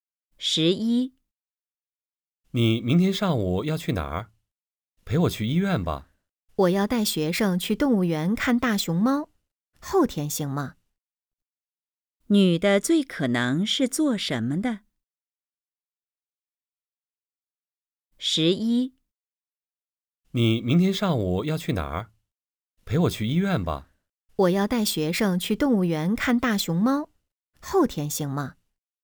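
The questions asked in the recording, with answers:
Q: 女的最可能是做什么的?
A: 老师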